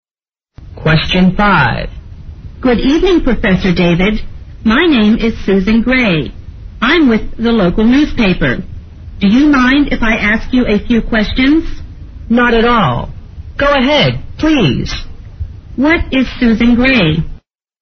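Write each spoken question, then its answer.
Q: What is Susan Gray?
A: A newspaper reporter (journalist)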